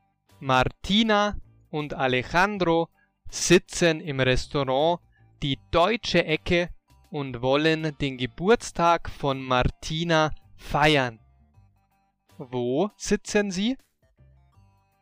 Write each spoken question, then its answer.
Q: Wo sitzen Sie?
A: Im Restaurant Die Deutsche Ecke.